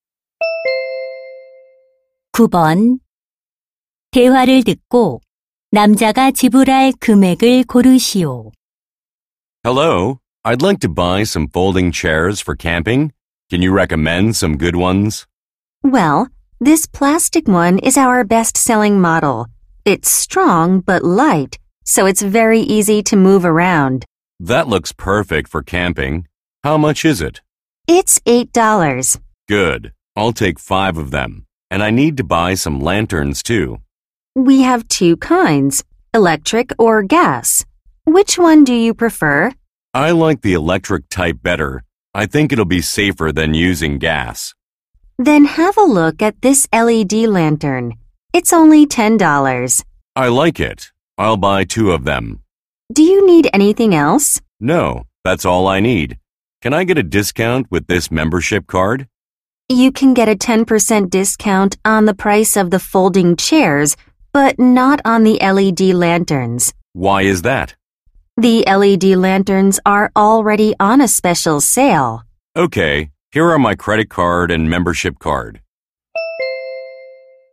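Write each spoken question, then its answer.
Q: 대화를 듣고 남자가 지불할 금액을 고르시오.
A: $56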